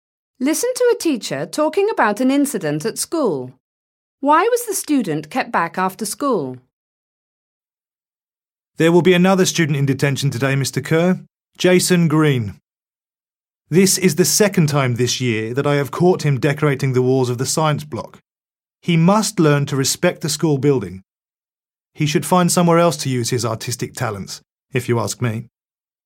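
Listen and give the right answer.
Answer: He drew graffiti on the walls of the science block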